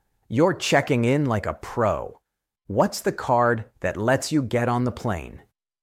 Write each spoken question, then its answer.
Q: What's the card that lets you get on the plane?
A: A boarding pass.